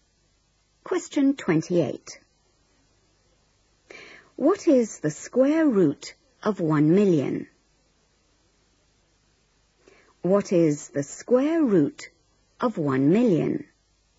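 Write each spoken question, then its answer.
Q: What is the square root of 1,000,000?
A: 1000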